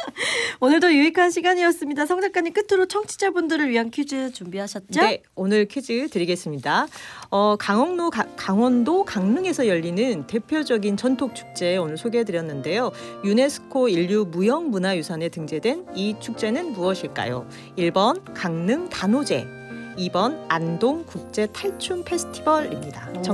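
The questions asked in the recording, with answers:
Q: 유네스코 인류무형문화유산에 등재된 이 축제는 무엇일까요?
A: 1: 강릉 단오제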